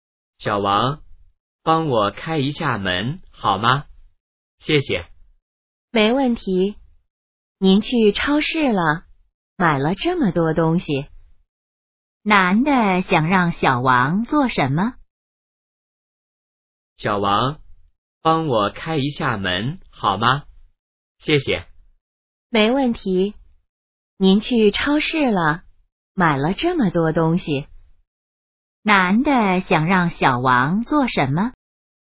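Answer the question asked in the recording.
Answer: 开门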